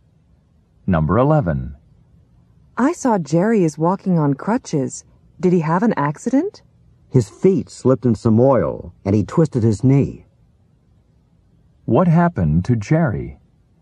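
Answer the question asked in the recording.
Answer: He slipped in oil and twisted his knee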